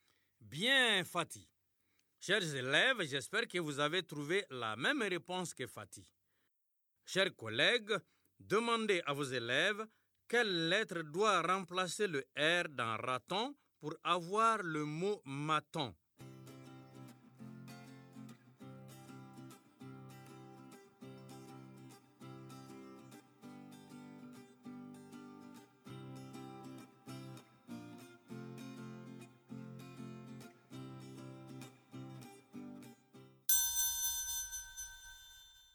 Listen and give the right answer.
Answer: Dans raton, on remplace R par M pour avoir maton.